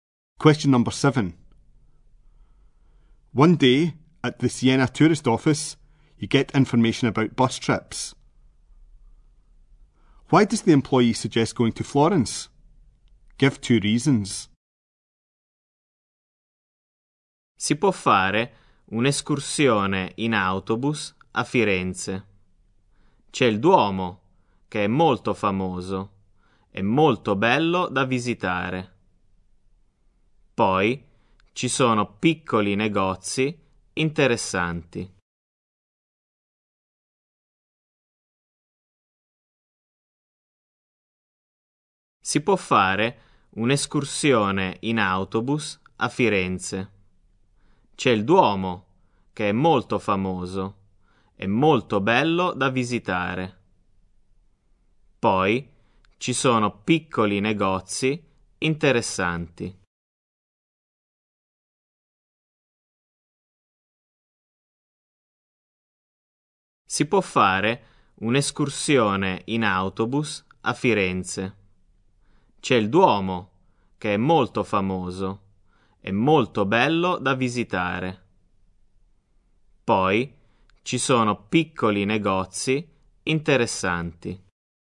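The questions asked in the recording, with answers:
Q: Why does the employee suggest going to Florence?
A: The famous cathedral (Duomo) is beautiful to visit; there are interesting little shops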